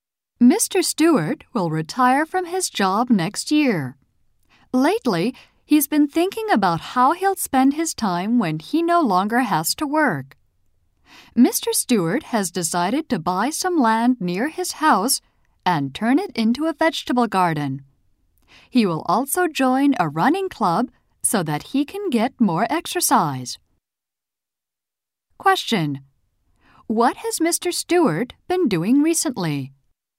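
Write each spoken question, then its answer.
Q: What has Mr. Stewart been doing recently?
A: Thinking about how to spend his time after retiring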